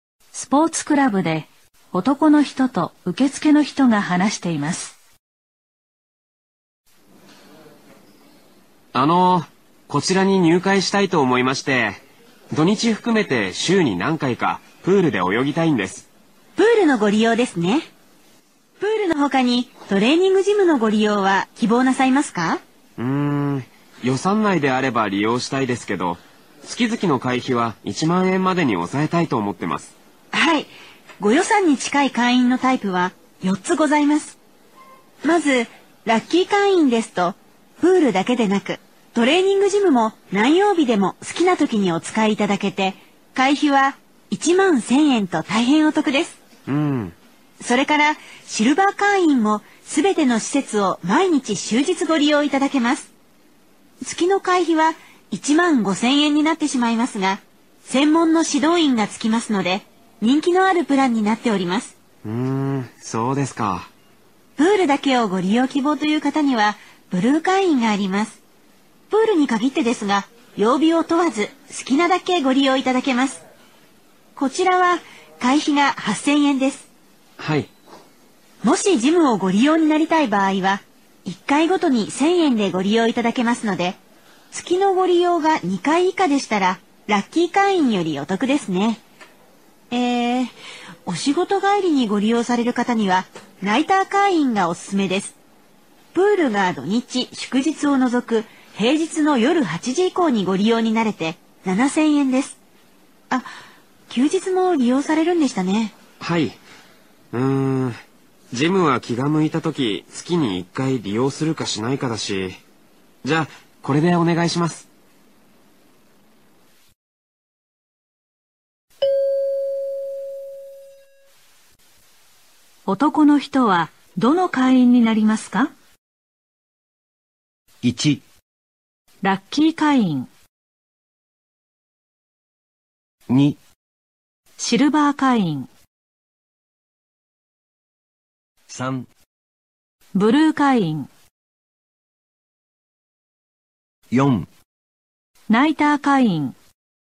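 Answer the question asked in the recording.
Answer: 3: ブルー会員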